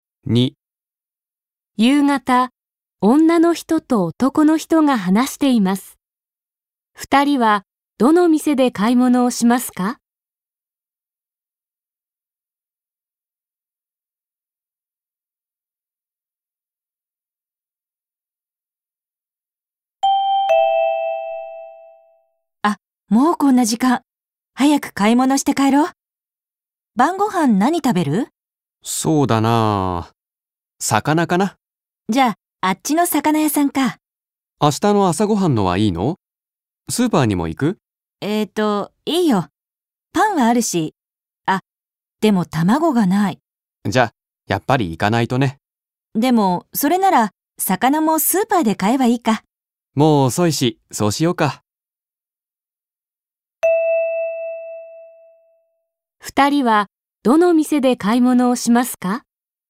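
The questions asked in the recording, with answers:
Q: 二人は、どの店で買い物をしますか?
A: スーパー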